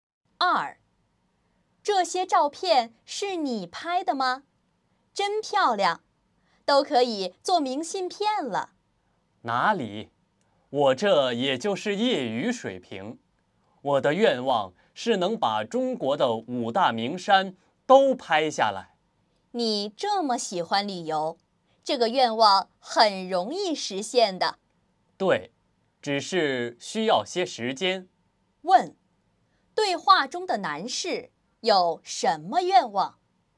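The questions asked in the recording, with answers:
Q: 对话中的男士有什么愿望?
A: 把中国的五大名山都拍下来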